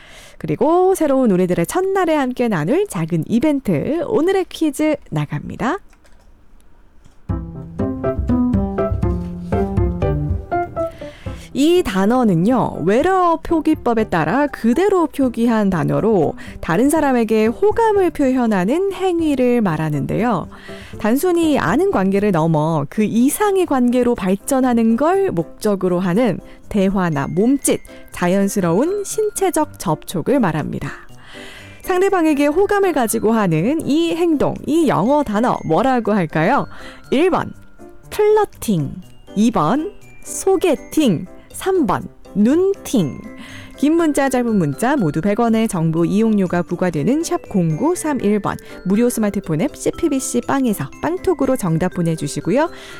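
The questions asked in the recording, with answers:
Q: 상대방에게 호감을 가지고 하는 이 행동, 이 영어 단어 뭐라고 할까요?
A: 1번: 플러팅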